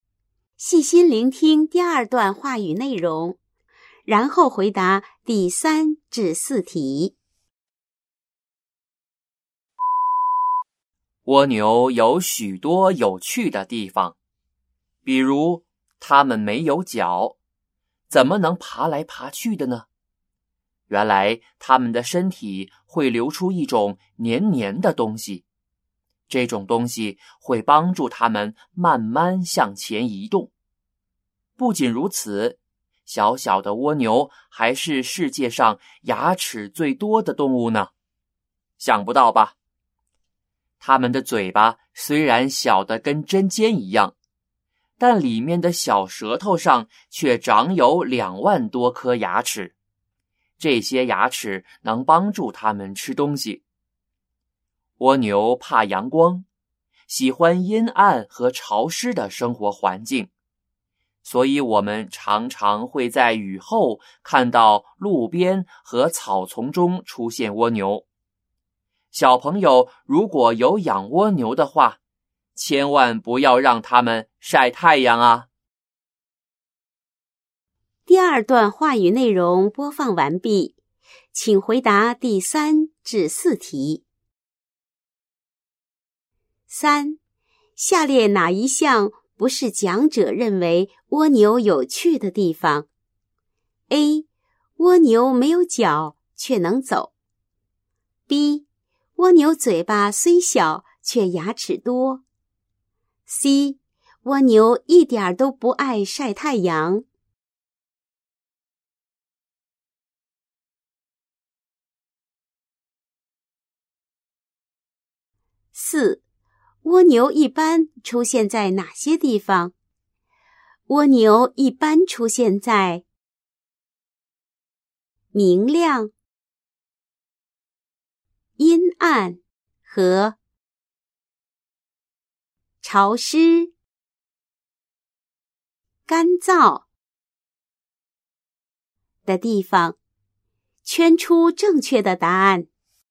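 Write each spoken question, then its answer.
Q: 蜗牛一般出现在哪些地方?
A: 阴暗、潮湿的地方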